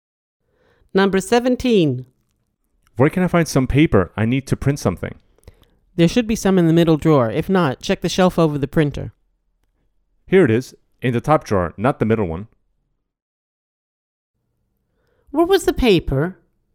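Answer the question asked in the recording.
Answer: in the top drawer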